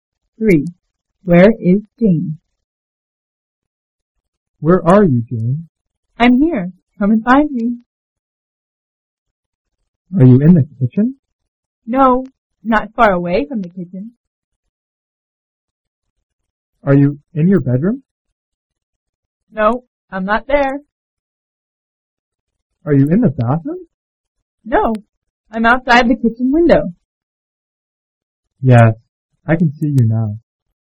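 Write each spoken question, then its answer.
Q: Where is Jane?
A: Outside the kitchen window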